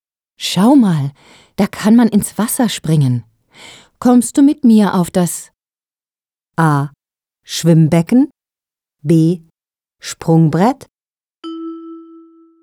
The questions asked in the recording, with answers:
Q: Kommst du mit mir auf das?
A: B. Kommst du mit mir auf das Sprungbrett?